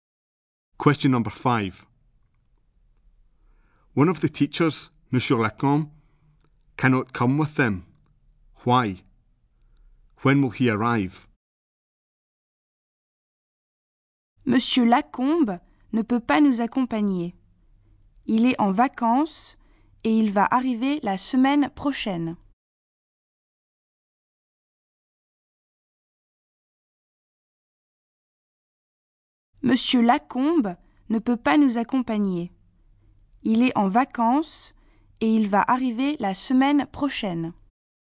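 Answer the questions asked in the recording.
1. He is on holiday
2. Next week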